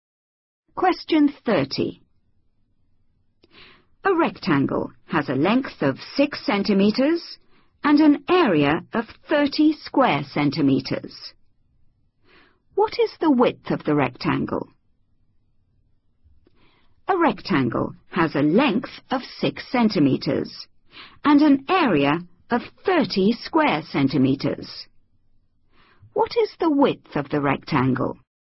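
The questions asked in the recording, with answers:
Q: What is the width of the rectangle?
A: 5 centimetres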